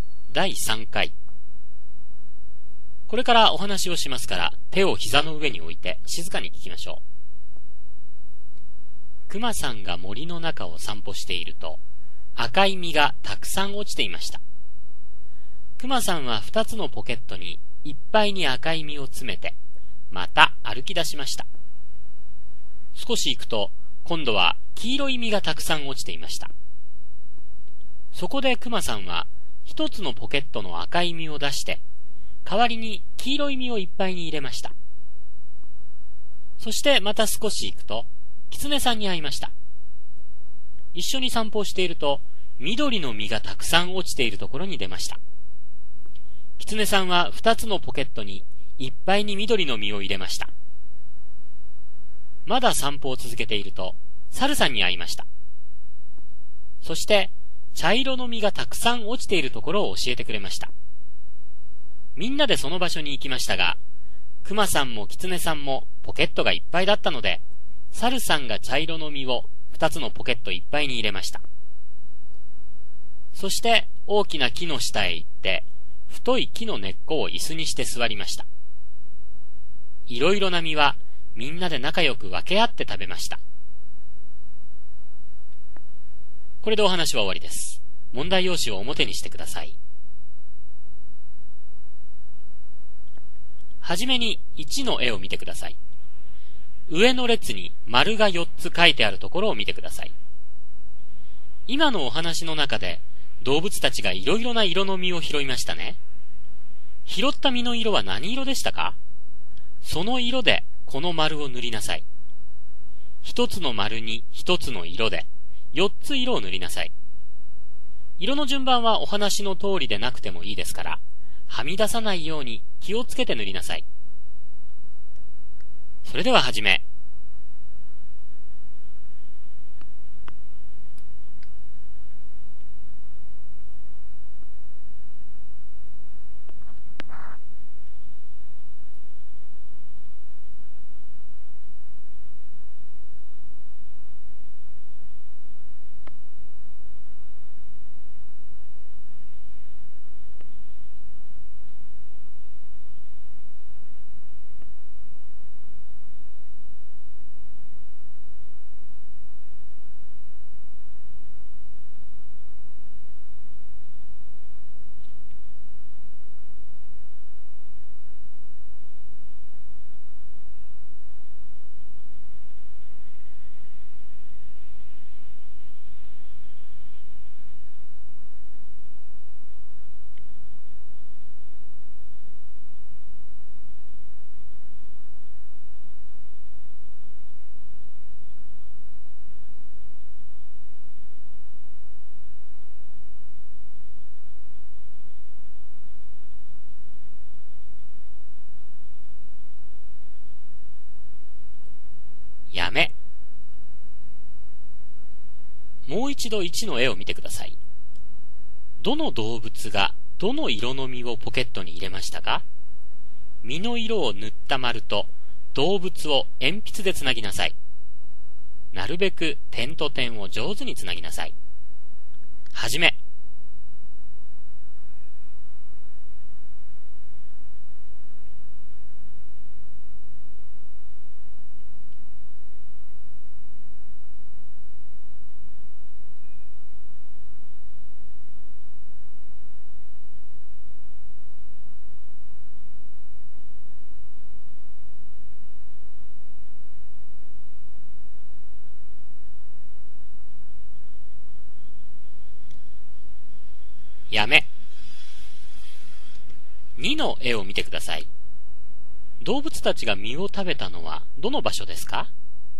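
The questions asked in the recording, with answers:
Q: 拾った実の色は何色でしたか?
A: 赤、黄色、緑、茶色

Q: どの動物がどの色の実をポケットに入れましたか?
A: クマさんは赤と黄色、キツネさんは緑、サルさんは茶色

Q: 動物たちが実を食べたのはどの場所ですか?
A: 大きな木の下(太い木の根っこに座って)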